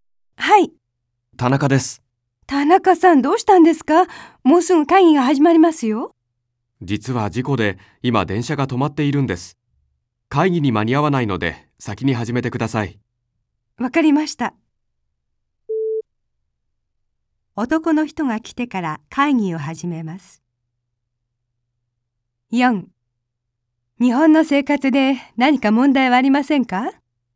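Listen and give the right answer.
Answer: ×(先に始める)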